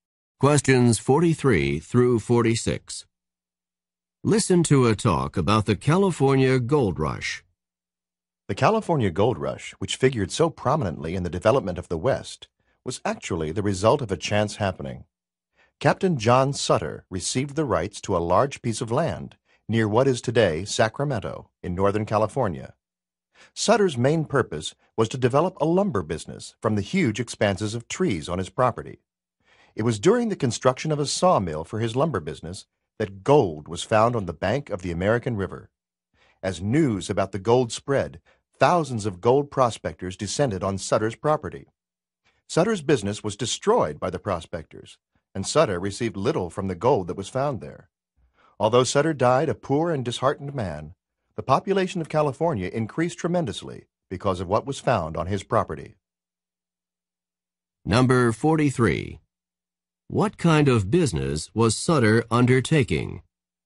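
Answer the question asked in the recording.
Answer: A lumber business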